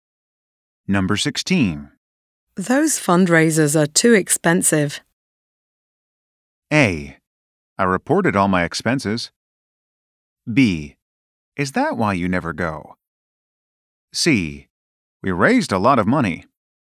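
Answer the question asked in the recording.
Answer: B: Is that why you never go?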